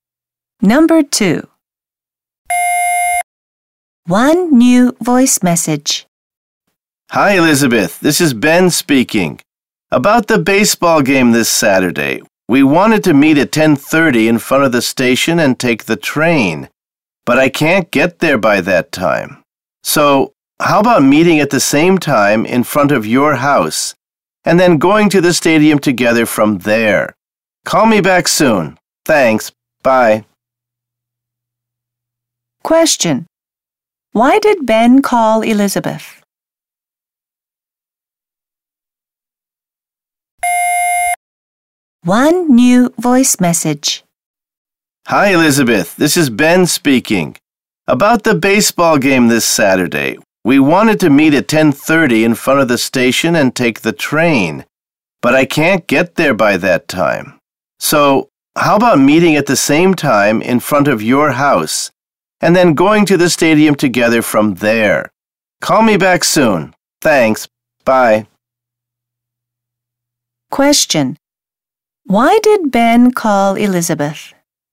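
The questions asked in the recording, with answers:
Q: Question. Why did Ben call Elizabeth?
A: To change the meeting place to in front of her house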